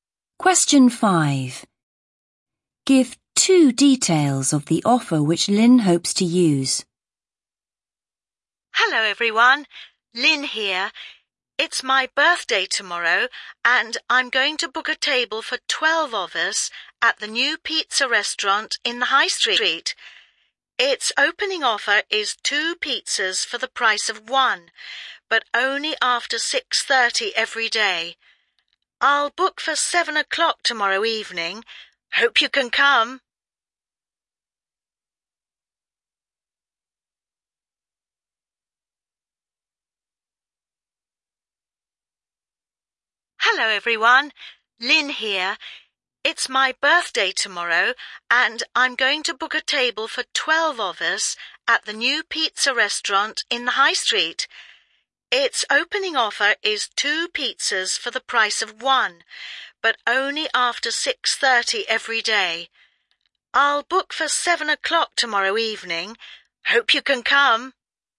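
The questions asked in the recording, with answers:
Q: Give two details of the offer which Lynn hopes to use.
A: Two pizzas for the price of one, only after 6:30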